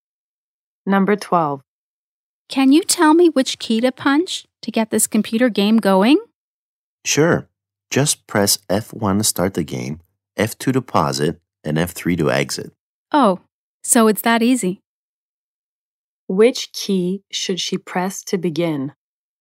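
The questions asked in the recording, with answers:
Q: Which key should she press to begin?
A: F1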